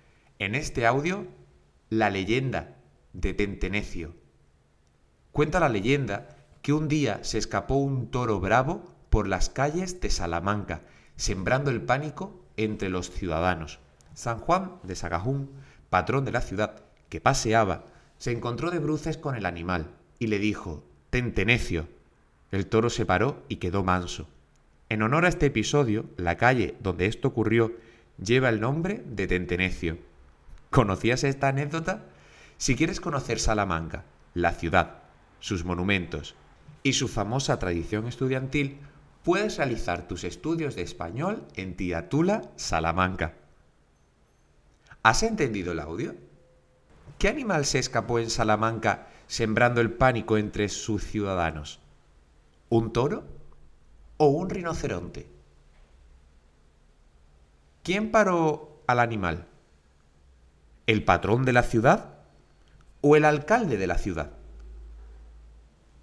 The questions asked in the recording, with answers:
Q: ¿Qué animal se escapó en Salamanca sembrando el pánico entre sus ciudadanos?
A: Se escapó un toro

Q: ¿Quién paró al animal? ¿El patrón de la ciudad o el alcalde de la ciudad?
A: fue San Juan de Sagajún, patrón de la ciudad.